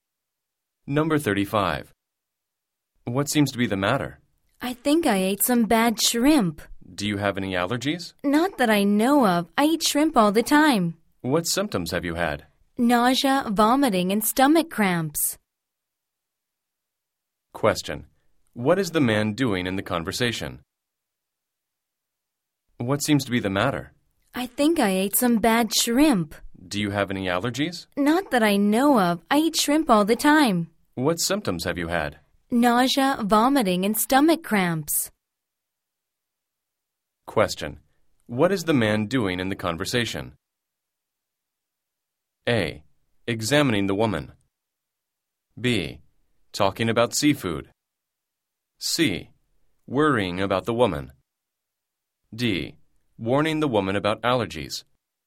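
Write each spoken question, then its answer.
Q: What is the man doing in the conversation?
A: A: Examining the woman.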